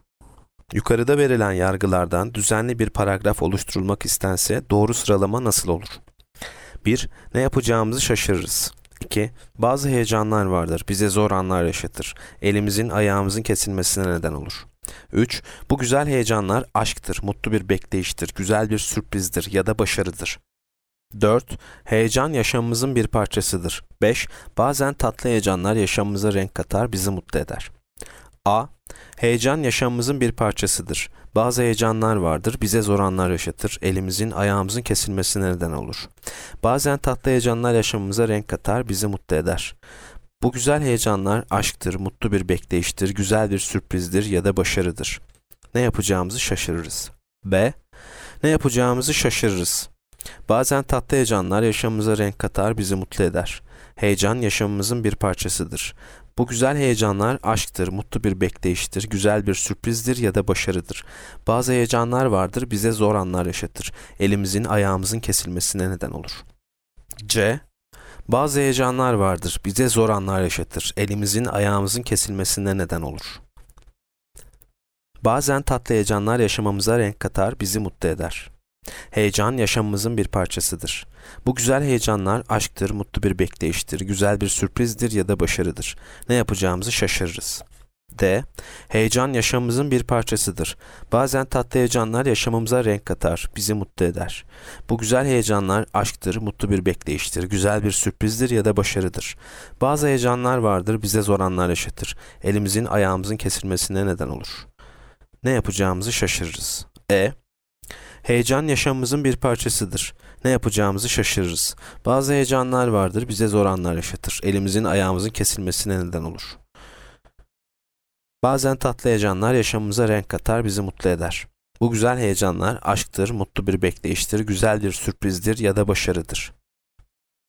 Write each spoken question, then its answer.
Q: Yukarıda verilen yargılardan düzenli bir paragraf oluşturulmak istense doğru sıralama nasıl olur?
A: Yanıt D.